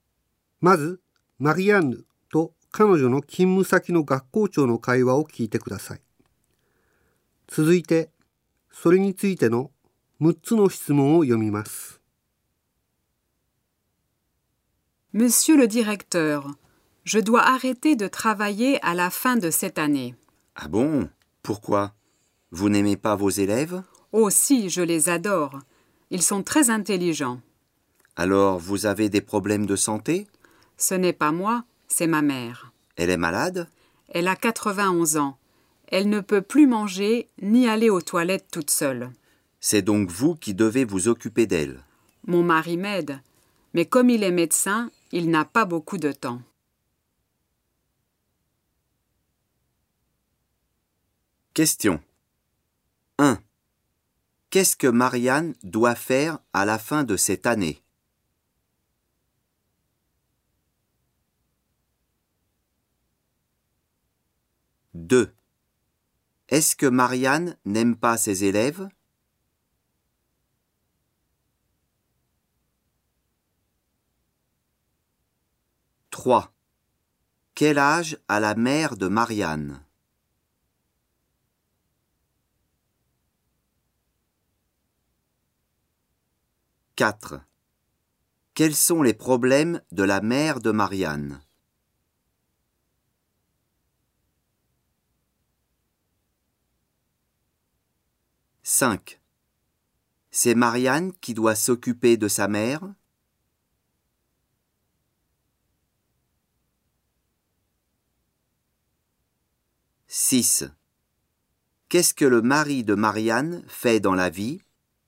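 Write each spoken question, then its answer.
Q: Qu'est-ce que Marianne doit faire à la fin de cette année ?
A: Elle doit arrêter de travailler.

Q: Est-ce que Marianne n'aime pas ses élèves?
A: Si, elle les adore.

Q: Quel âge a la mère de Marianne?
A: Elle a 91 ans.

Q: Quels sont les problèmes de la mère de Marianne?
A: Elle ne peut plus manger ni aller aux toilettes toute seule.

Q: C'est Marianne qui doit s'occuper de sa mère?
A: Oui, son mari l'aide mais il n'a pas beaucoup de temps.

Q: Qu'est-ce que le mari de Marianne fait dans la vie?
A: Il est médecin.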